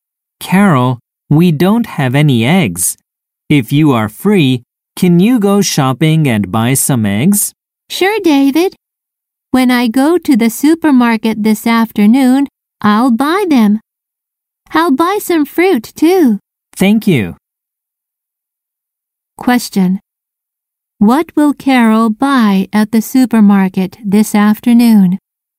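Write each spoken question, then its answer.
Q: What will Carol buy at the supermarket this afternoon?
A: Eggs and some fruit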